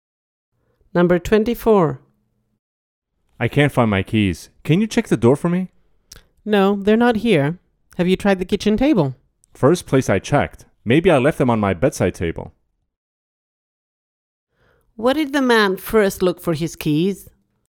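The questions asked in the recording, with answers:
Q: Where did the man first look for his keys?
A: the kitchen table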